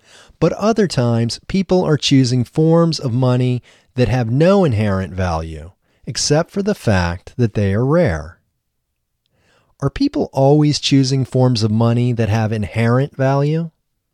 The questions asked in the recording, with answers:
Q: Are people always choosing forms of money that have inherent value?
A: No, people aren't always choosing forms of money that have inherent value.